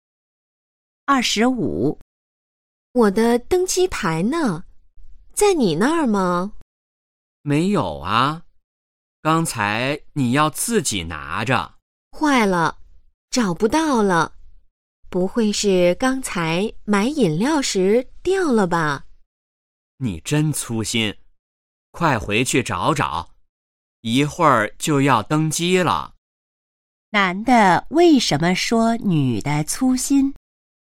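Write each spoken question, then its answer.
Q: 男的为什么说女的粗心?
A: 女的把登机牌弄丢了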